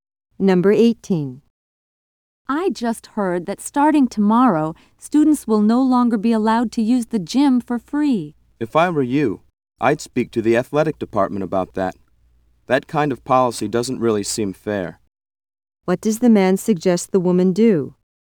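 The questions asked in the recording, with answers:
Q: What does the man suggest the woman do?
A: Talk to the athletic department.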